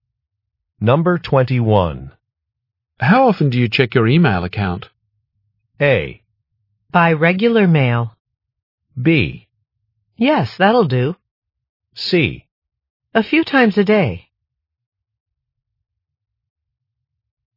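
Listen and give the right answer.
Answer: C: A few times a day.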